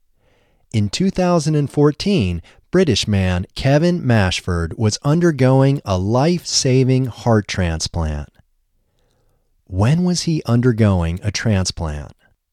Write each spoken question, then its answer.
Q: When was he undergoing a transplant?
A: He was undergoing a transplant in 2014.